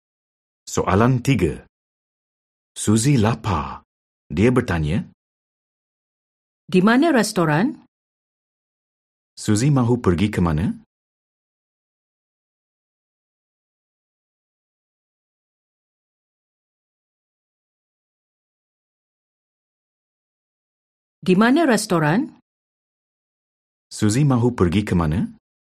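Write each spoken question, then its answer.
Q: Suzy mahu pergi ke mana?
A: Restoran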